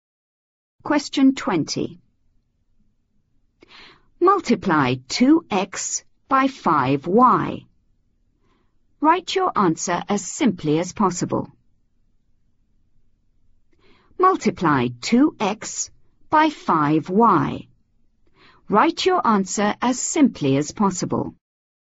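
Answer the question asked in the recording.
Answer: 10xy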